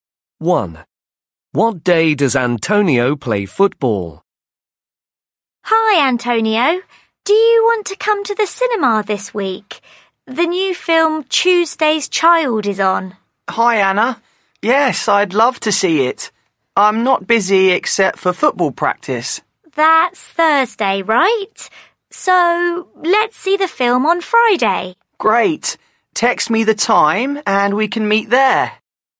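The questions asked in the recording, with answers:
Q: What day does Antonio play football?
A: Thursday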